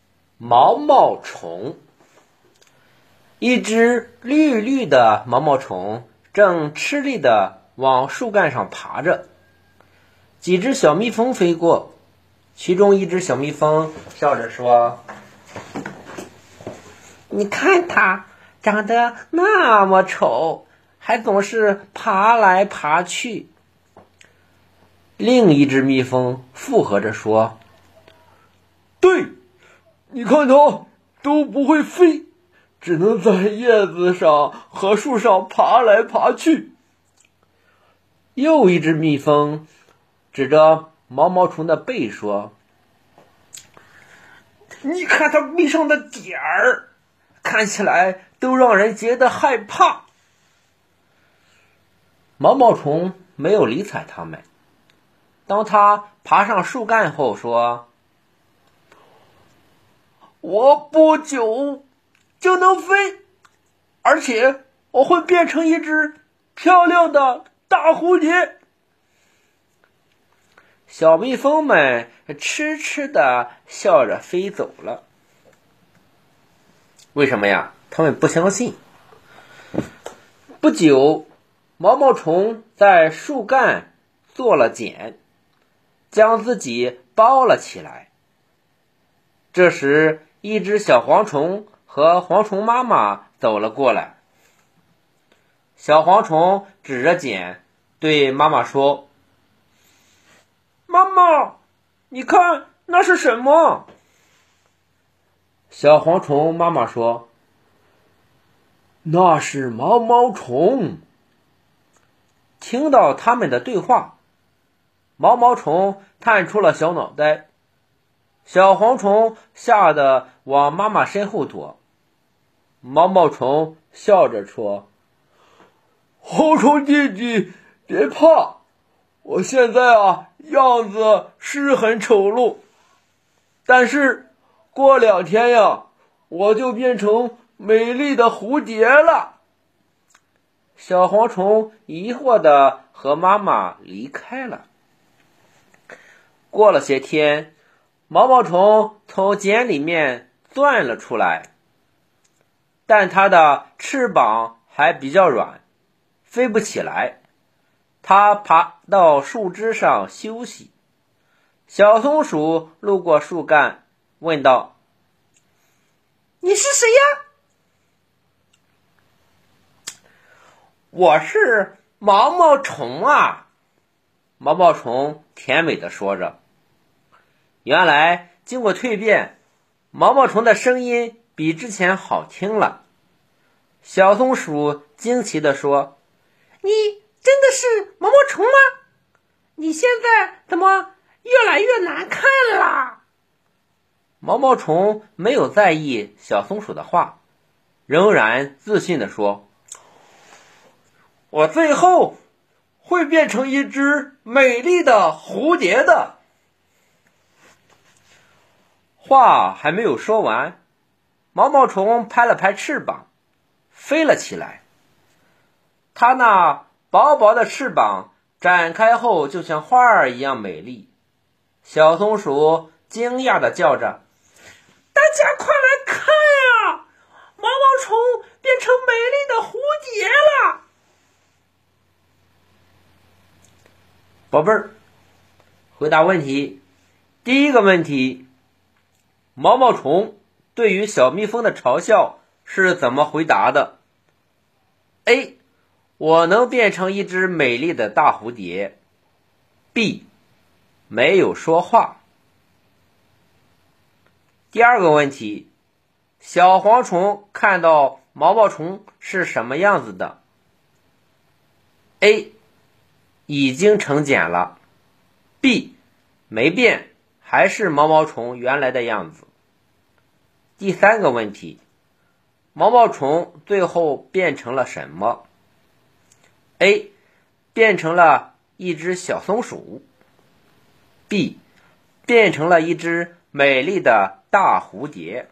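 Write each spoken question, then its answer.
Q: 小蝗虫看到毛毛虫是什么样子的?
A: A: 已经成茧了。

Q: 毛毛虫最后变成了什么?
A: B: 变成了一只美丽的大蝴蝶。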